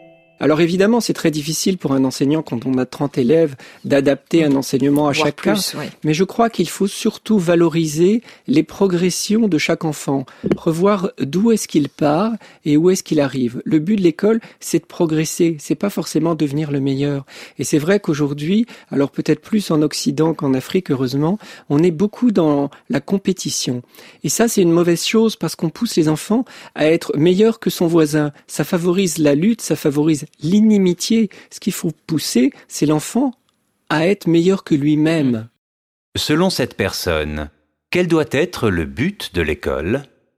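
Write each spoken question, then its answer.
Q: Selon cette personne, quel doit être le but de l'école ?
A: Faire progresser chaque enfant, qu'il devienne meilleur que lui-même, pas forcément le meilleur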